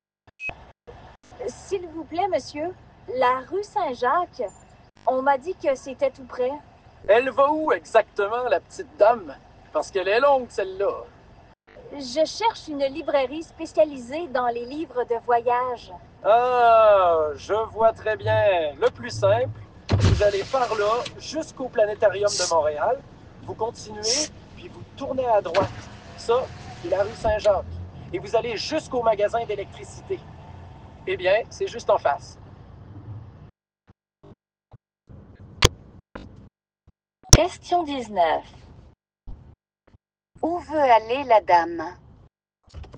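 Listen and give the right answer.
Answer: Dans une librairie spécialisée dans les livres de voyage, rue Saint-Jacques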